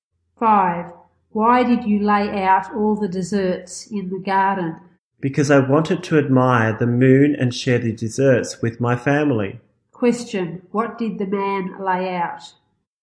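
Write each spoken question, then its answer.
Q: What did the man lay out?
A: All the desserts.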